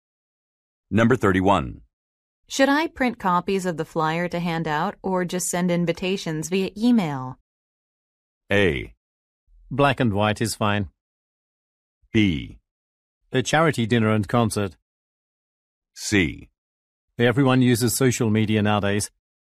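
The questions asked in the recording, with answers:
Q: Should I print copies of the flyer to hand out or just send invitations via email?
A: C: Everyone uses social media nowadays.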